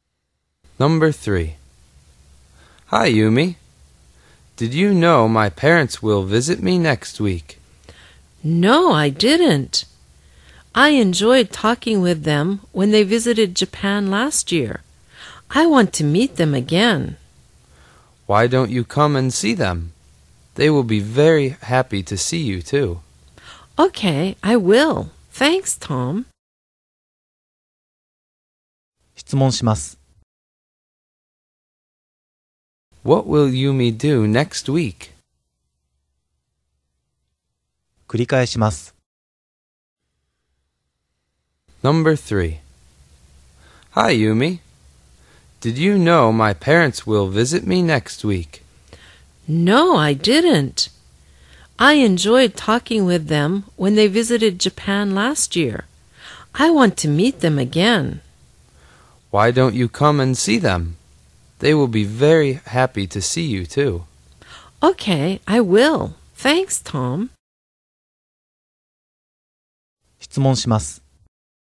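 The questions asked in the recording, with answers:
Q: What will Yumi do next week?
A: She will meet Tom's parents.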